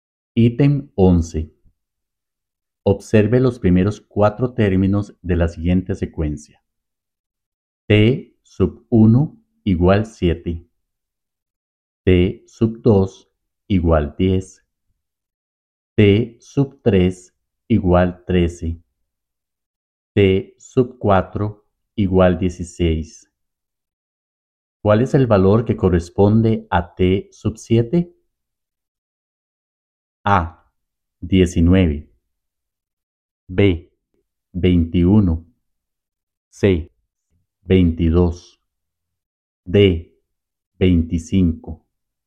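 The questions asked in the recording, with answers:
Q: ¿Cuál es el valor que corresponde a T sub 7?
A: D: 25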